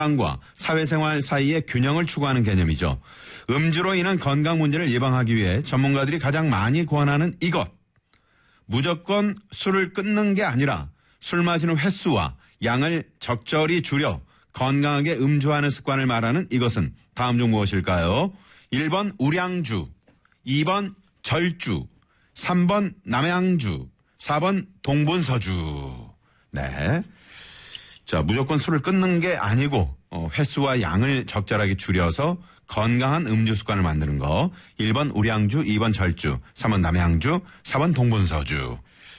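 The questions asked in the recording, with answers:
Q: 무조건 술을 끊는 게 아니라 술 마시는 횟수와 양을 적절히 줄여 건강하게 음주하는 습관을 말하는 이것은 다음 중 무엇일까요?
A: 2번: 절주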